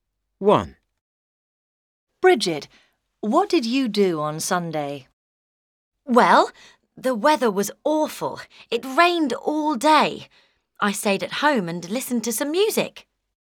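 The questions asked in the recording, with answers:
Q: Bridget, what did you do on Sunday?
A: She stayed at home and listened to some music.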